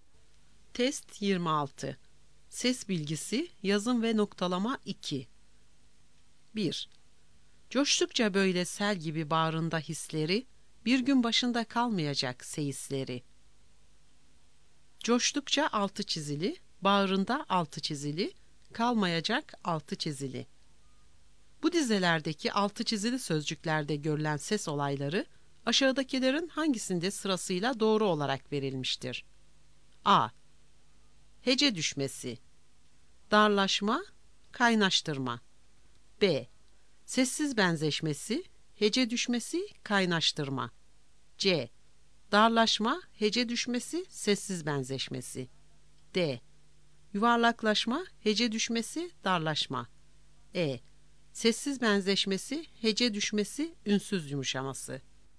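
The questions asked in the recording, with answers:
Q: Bu dizelerdeki altı çizili sözcüklerde görülen ses olayları, aşağıdakilerin hangisinde sırasıyla doğru olarak verilmiştir?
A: B: Sessiz benzeşmesi, hece düşmesi, kaynaştırma.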